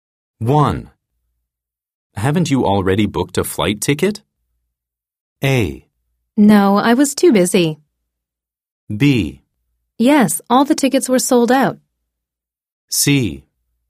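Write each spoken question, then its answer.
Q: Haven't you already booked a flight ticket?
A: A: No, I was too busy.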